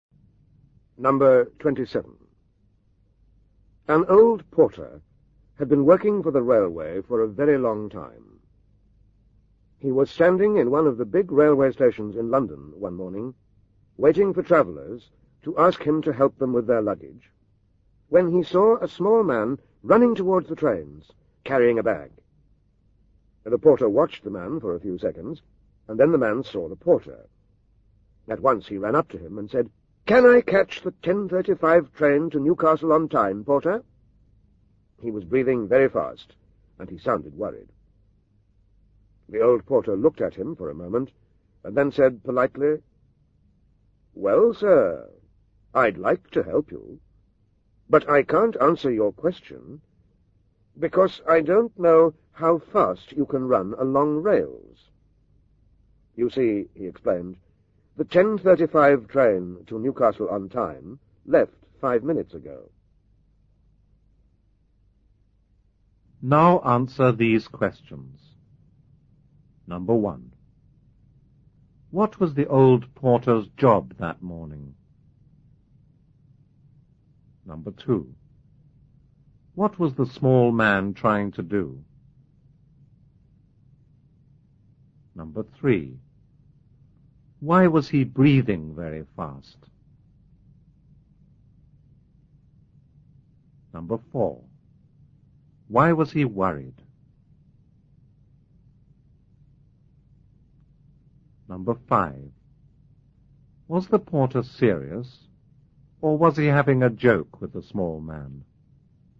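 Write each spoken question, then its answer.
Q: What was the old porter's job that morning?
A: Waiting to help travellers with their luggage

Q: What was the small man trying to do?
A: To catch the 10:35 train to Newcastle

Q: Why was he breathing very fast?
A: Because he had been running

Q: Why was he worried?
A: He was afraid he would miss his train

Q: Was the porter serious, or was he having a joke with the small man?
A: He was having a joke with him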